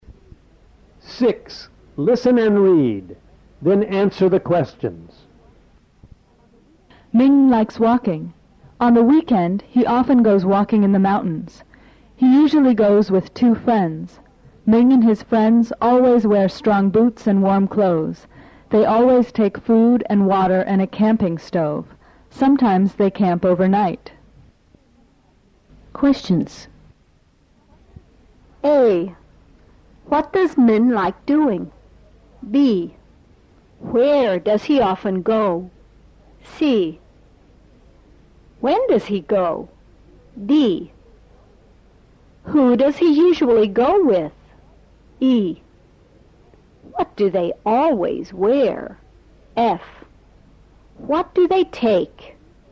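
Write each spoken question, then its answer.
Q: What does Min like doing?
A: Walking

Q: Where does he often go?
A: Walking in the mountains

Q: When does he go?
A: On the weekend

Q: Who does he usually go with?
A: Two friends

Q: What do they always wear?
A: Strong boots and warm clothes

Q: What do they take?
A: Food, water and a camping stove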